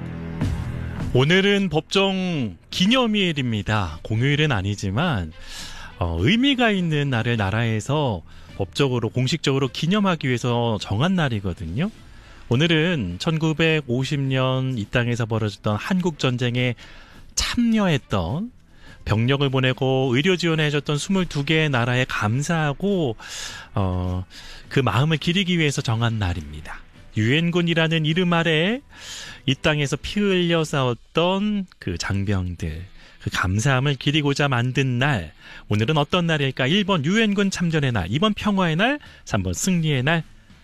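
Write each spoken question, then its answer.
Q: 오늘은 어떤 날일까? 1번 유엔군 참전의 날, 2번 평화의 날, 3번 승리의 날.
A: 1번: 유엔군 참전의 날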